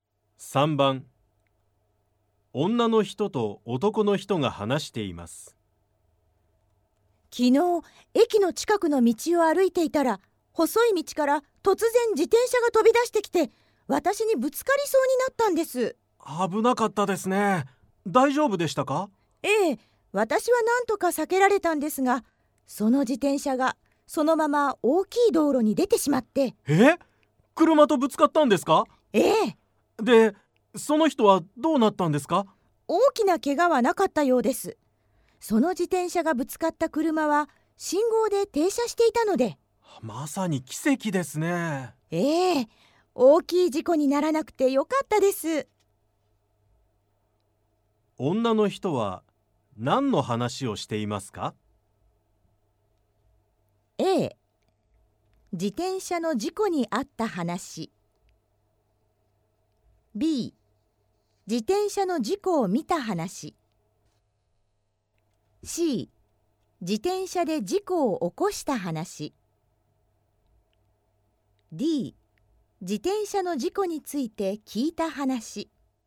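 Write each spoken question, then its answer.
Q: 女の人は何の話をしていますか?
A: B: 自転車の事故を見た話。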